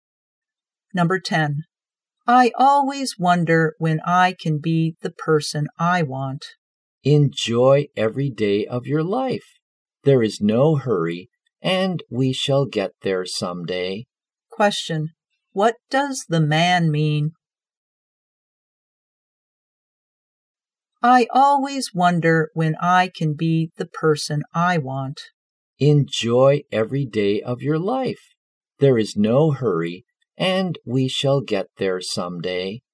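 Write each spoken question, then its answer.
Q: what does the man mean?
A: Take your time and enjoy life; you'll become that person someday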